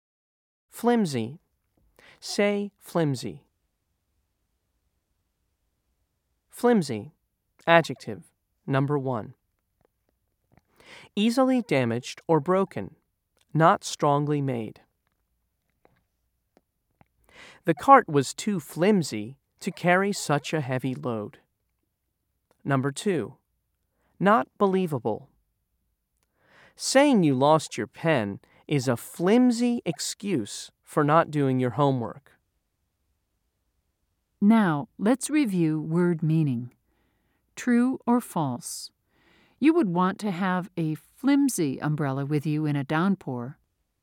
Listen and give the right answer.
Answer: If you said false, you're correct.